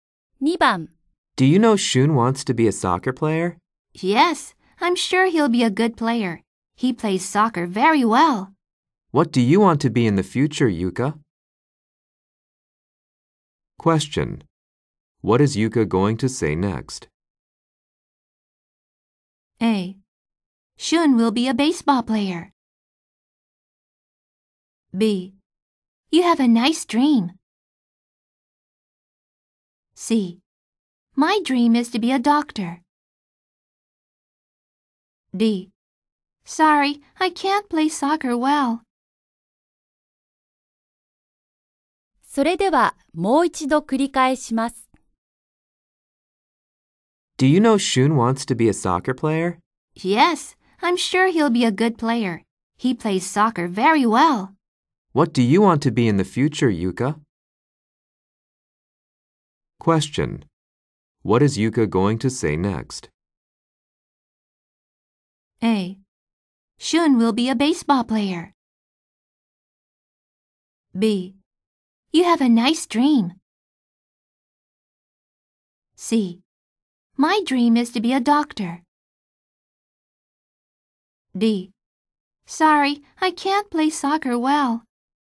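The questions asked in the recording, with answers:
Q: What is Yuka going to say next?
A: C: My dream is to be a doctor.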